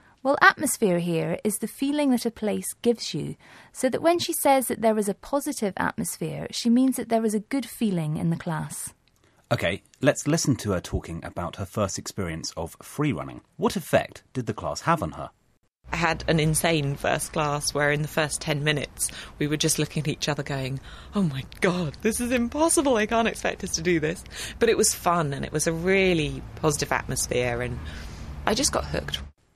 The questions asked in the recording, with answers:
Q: What effect did the class have on her?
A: She says she was hooked after her first class.